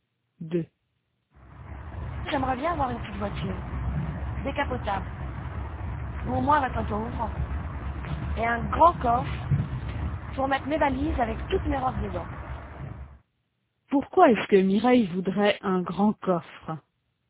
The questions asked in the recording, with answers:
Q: Pourquoi est-ce que Mireille voudrait un grand coffre?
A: Pour mettre ses valises avec toutes ses robes dedans.